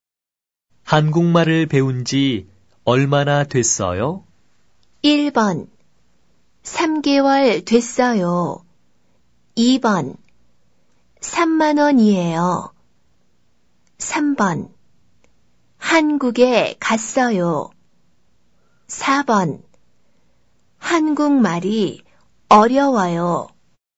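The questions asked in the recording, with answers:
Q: 한국말을 배운 지 얼마나 됐어요?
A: 1: 3개월 됐어요.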